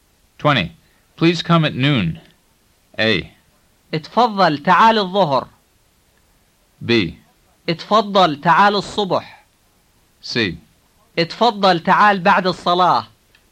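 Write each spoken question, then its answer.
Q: Please come at noon.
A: A: اتفضل تعال الظهر.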